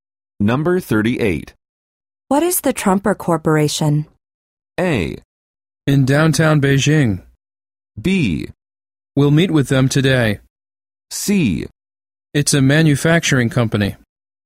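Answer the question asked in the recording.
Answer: C: It's a manufacturing company.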